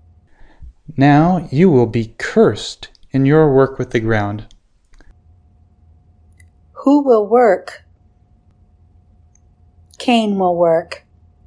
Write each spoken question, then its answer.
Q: Who will work?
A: Cain will work.